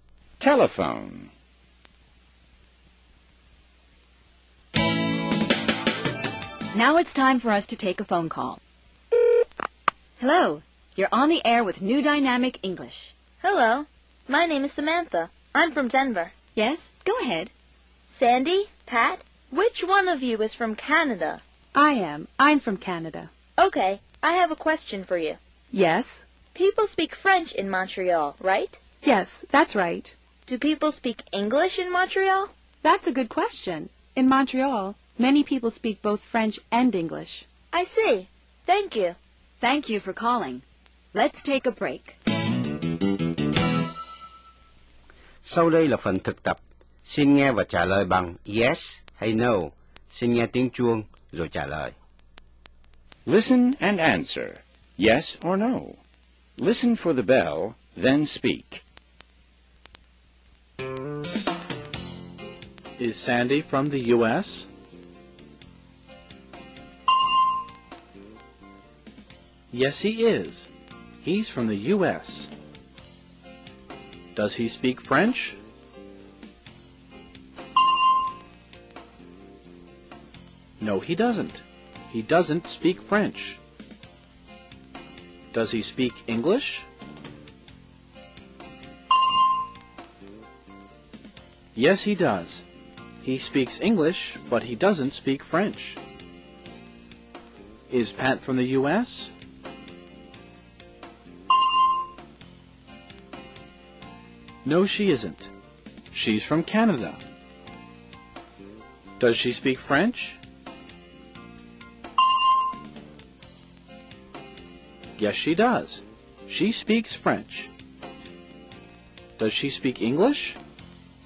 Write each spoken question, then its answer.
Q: Is Sandy from the U.S.?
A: Yes, he is. He's from the U.S.

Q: Does he speak French?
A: No, he doesn't. He doesn't speak French.

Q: Does he speak English?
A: Yes, he does. He speaks English, but he doesn't speak French.

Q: Is Pat from the U.S.?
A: No, she isn't. She's from Canada.